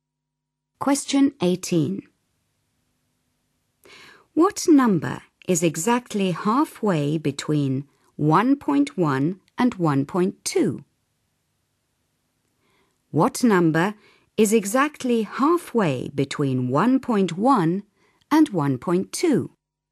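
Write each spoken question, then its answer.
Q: What number is exactly halfway between 1.1 and 1.2?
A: 1.15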